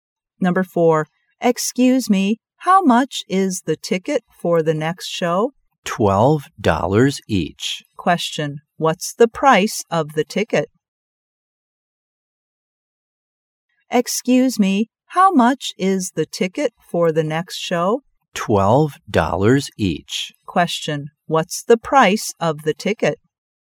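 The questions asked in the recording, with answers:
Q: What's the price of the ticket?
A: $12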